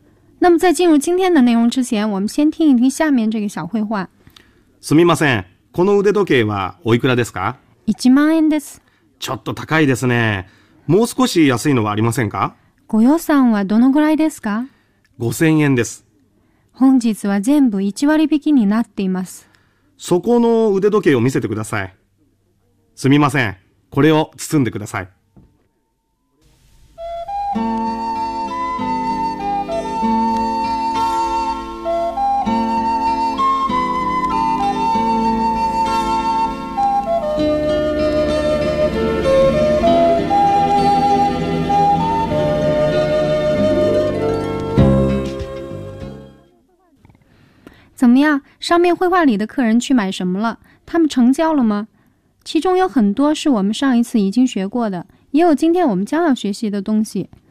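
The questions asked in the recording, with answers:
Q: 上面绘画里的客人去买什么了?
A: 手表(腕時計)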